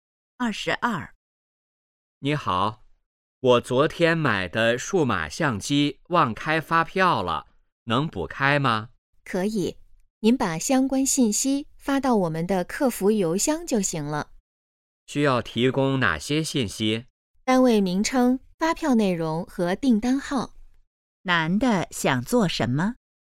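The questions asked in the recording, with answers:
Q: 男的想做什么?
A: 补开发票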